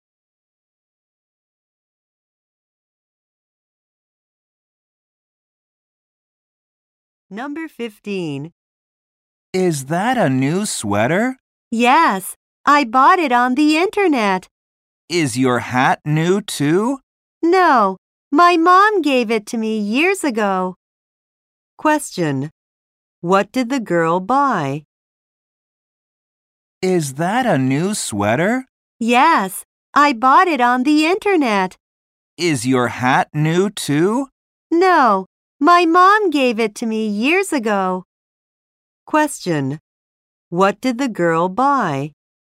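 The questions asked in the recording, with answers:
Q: What did the girl buy?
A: A sweater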